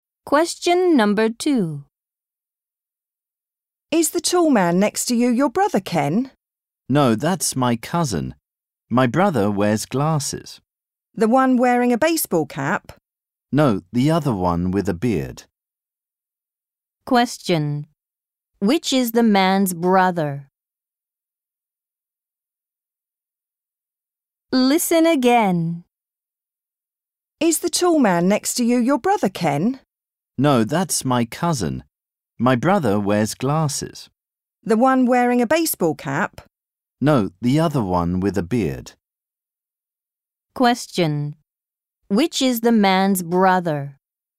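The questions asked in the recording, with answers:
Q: Which is the man's brother?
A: The one who wears glasses and has a beard (not the baseball cap)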